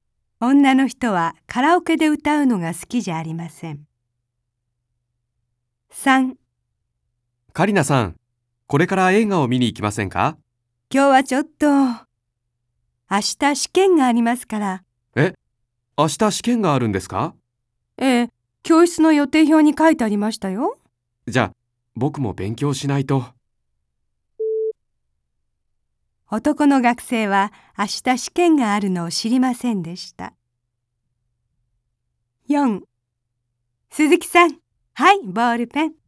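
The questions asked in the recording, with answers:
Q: 男の学生は明日試験があるのを知りませんでした。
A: 正しい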